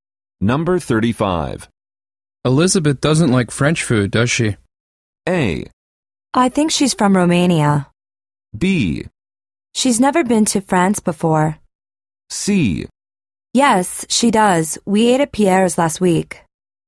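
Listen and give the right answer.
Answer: C: Yes, she does. We ate at Pierre's last week.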